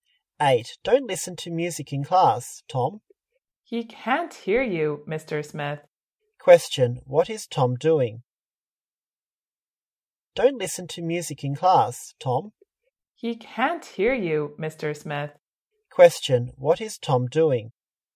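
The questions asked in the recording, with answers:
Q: Question, what is Tom doing?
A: Listening to music in class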